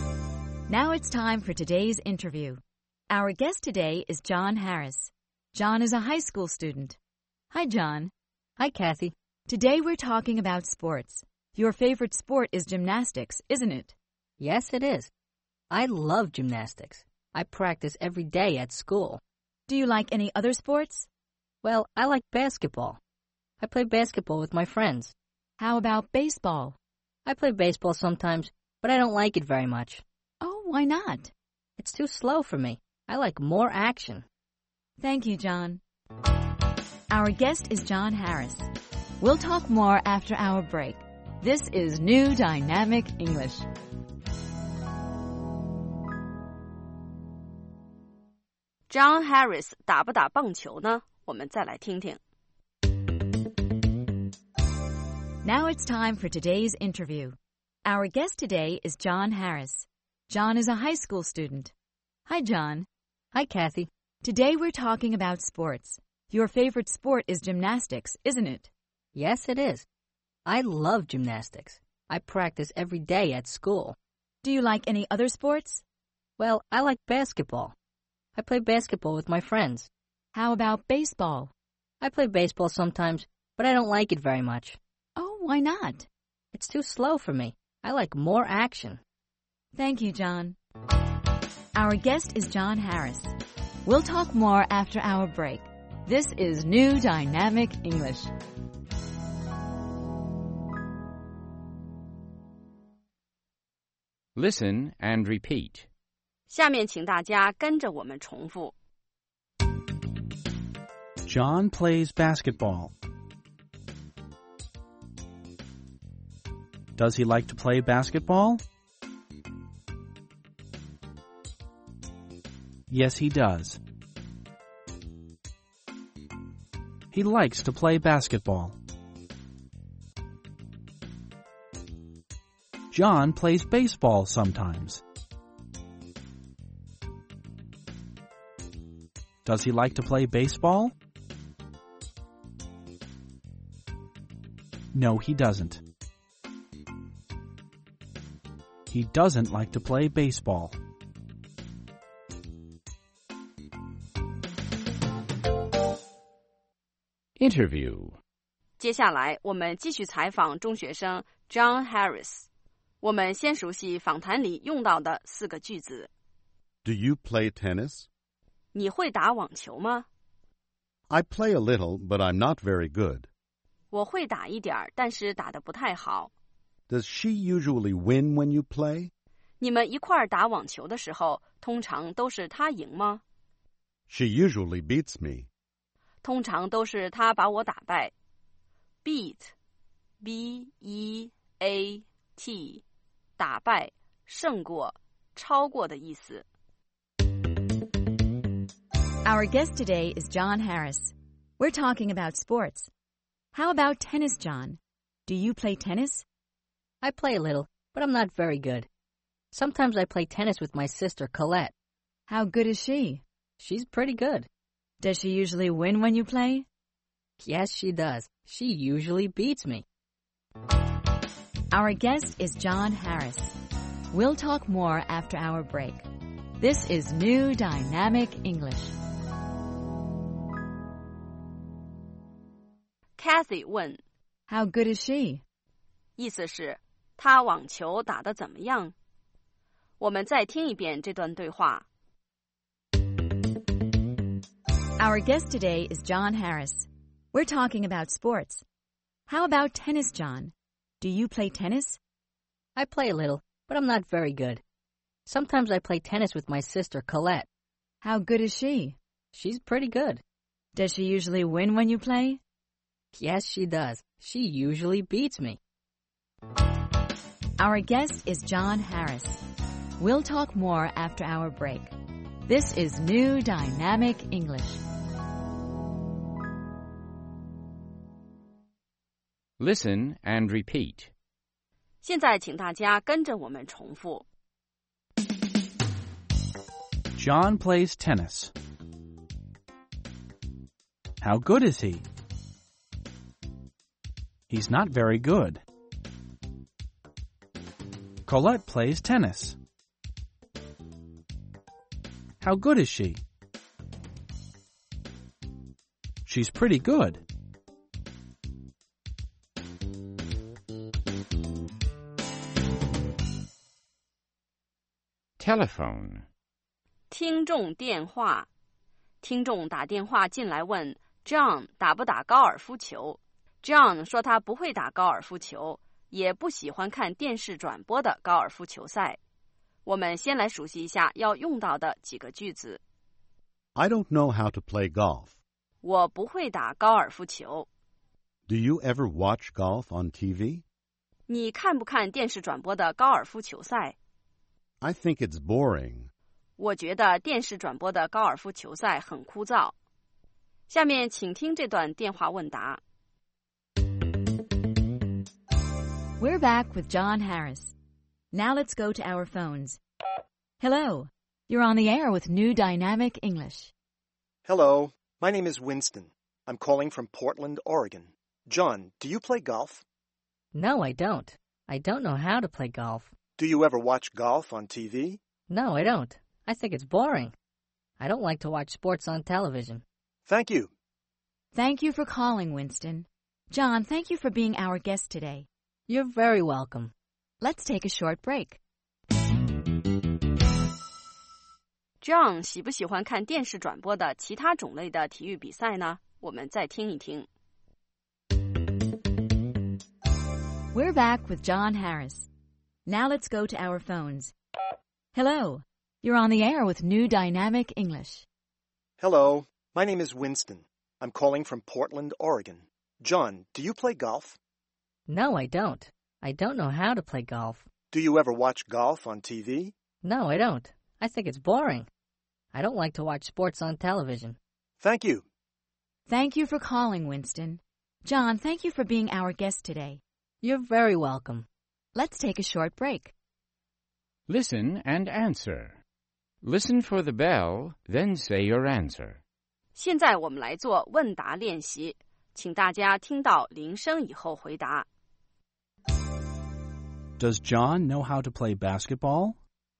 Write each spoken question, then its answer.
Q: Does John know how to play basketball?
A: Yes, he does. He knows how to play basketball.